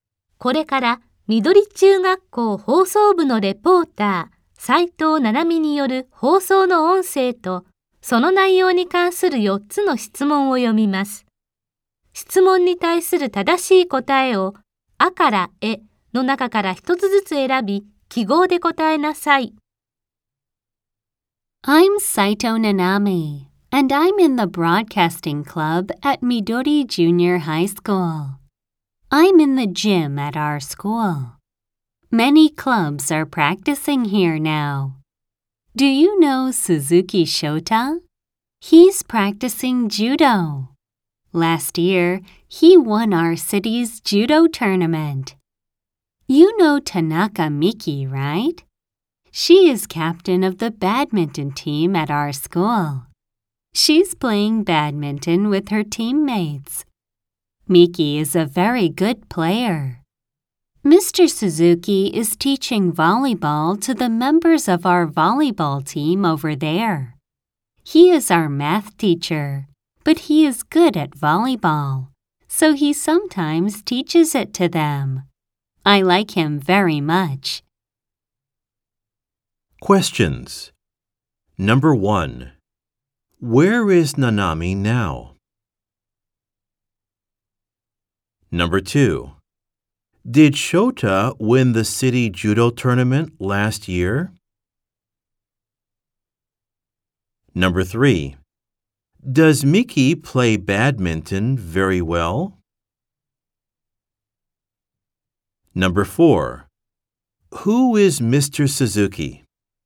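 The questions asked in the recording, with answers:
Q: Where is Nanami now?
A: In the gym at her school.

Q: Did Shota win the city judo tournament last year?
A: Yes, he did.

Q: Does Miki play badminton very well?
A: Yes, she does.

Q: Who is Mr. Suzuki?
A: He is their math teacher.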